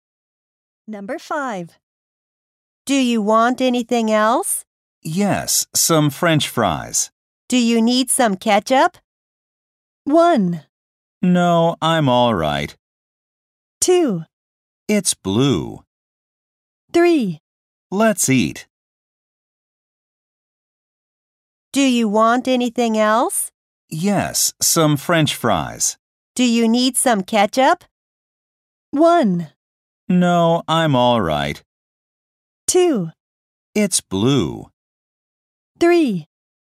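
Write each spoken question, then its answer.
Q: Do you need some ketchup?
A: 1: No, I'm all right.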